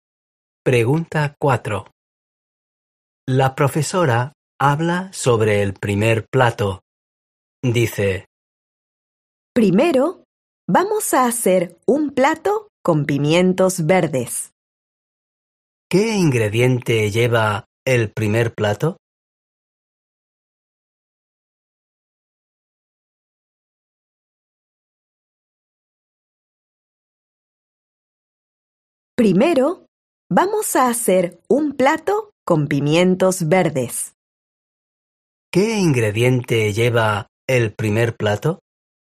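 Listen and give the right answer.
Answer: Pimientos verdes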